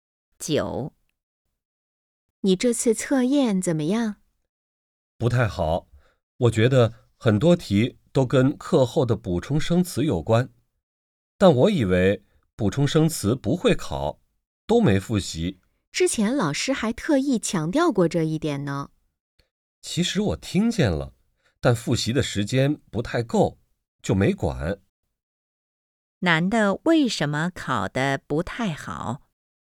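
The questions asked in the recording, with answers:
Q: 男的为什么考得不太好?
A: 没复习课后的补充生词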